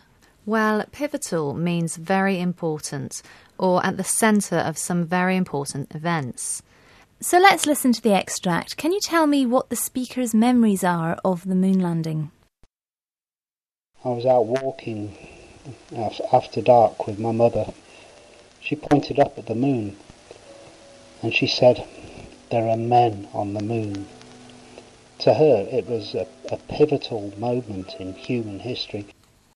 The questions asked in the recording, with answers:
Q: Can you tell me what the speaker's memories are of the moon landing?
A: Well, the speaker was out walking with his mother, who pointed up to the moon and told him, "There are men on the moon."